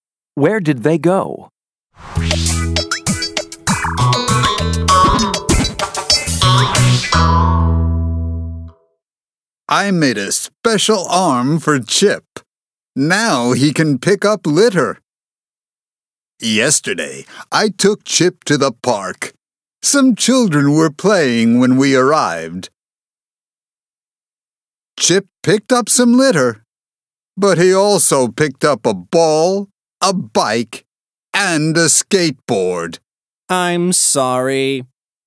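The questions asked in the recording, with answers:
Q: Where did they go?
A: To the park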